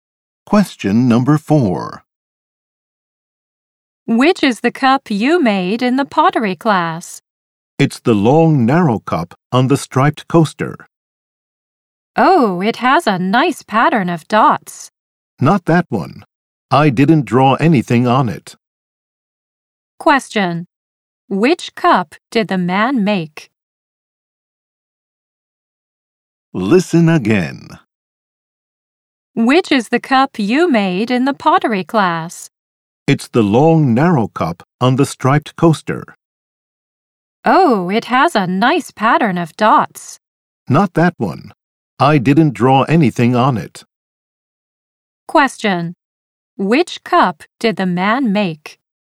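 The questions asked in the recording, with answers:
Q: Which cup did the man make?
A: The long, narrow, plain cup with no drawing, on the striped coaster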